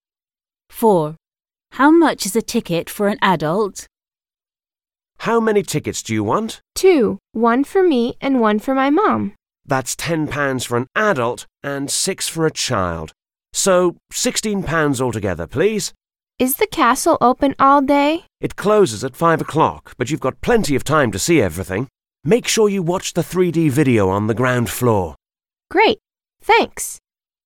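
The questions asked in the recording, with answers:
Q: How much is a ticket for an adult?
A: £10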